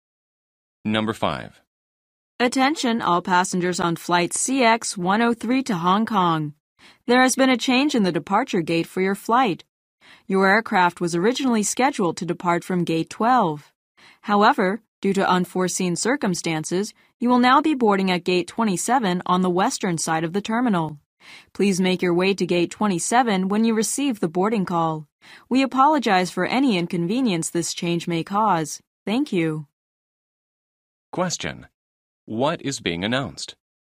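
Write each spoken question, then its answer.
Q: What is being announced?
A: A change of departure gate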